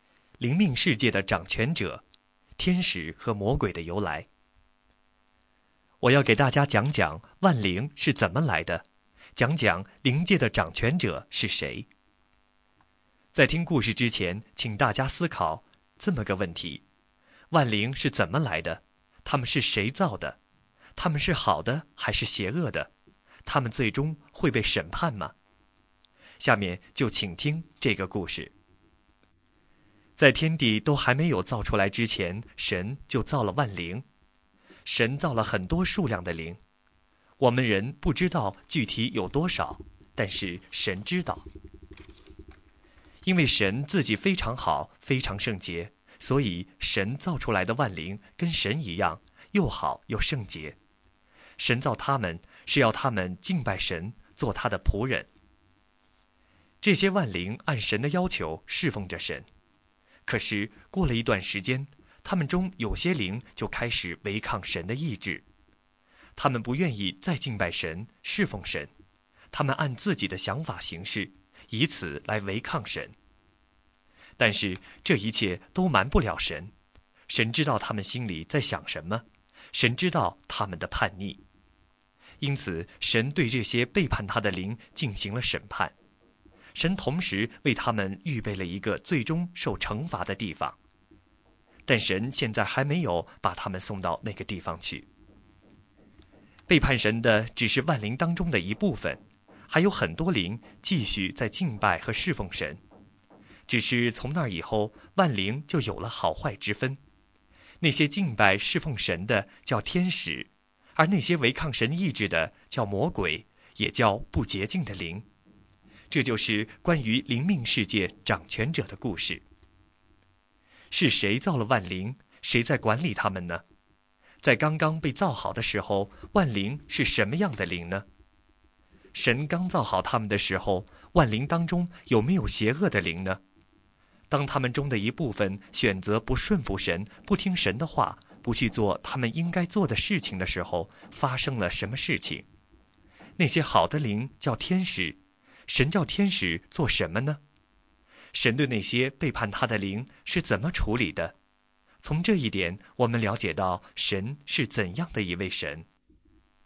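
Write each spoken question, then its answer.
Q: 在刚刚被造好的时候,万灵是什么样的灵呢?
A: 又好又圣洁的灵

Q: 神刚造好他们的时候,万灵当中有没有邪恶的灵呢?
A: 没有

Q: 当他们中的一部分选择不顺服神,不听神的话,不去做他们应该做的事情的时候,发生了什么事情?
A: 神审判了他们,为他们预备了最终受惩罚的地方,他们成了魔鬼

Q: 那些好的灵叫天使,神叫天使做什么呢?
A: 敬拜神、侍奉神

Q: 神对那些背叛他的灵是怎么处理的?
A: 审判他们,并预备了最终受惩罚的地方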